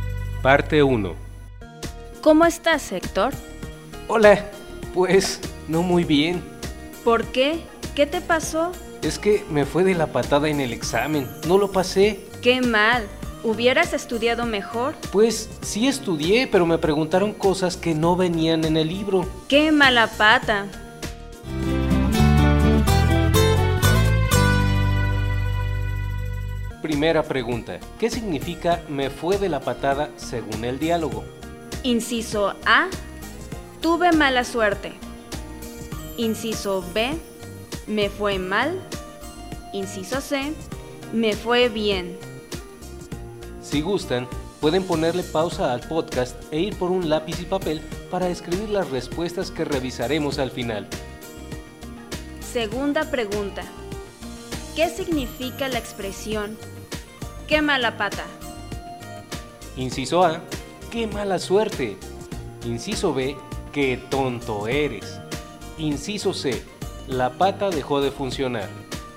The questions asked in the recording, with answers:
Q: ¿Qué significa la expresión ¡Qué mala pata.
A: Respuesta, inciso A. ¿Qué mala suerte?